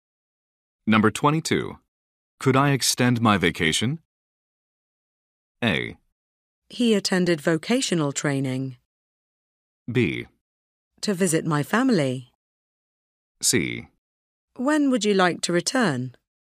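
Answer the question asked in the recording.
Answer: C: When would you like to return?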